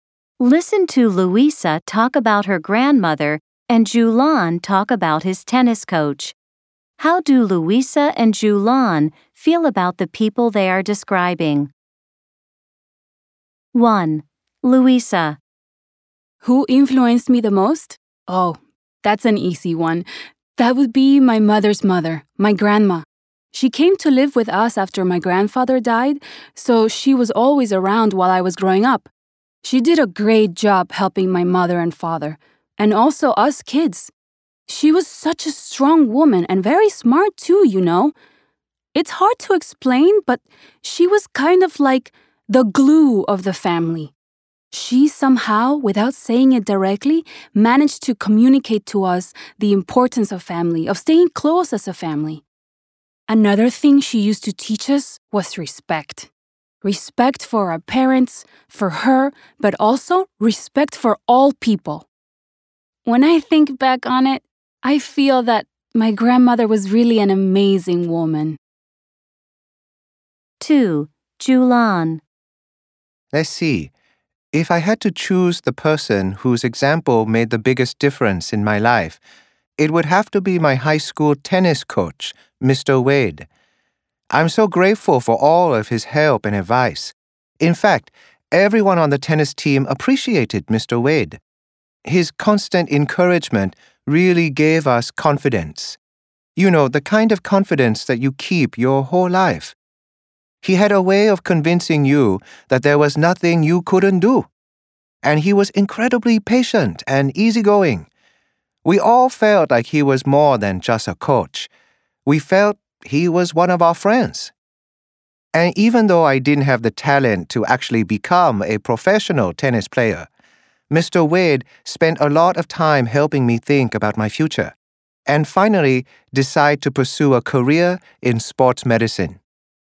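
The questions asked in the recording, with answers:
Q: How do Luisa and Julian feel about the people they are describing?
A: Luisa thinks her grandmother was an amazing woman

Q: How do Luisa and Julian feel about the people they are describing?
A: Julian is grateful to his coach Mr. Wade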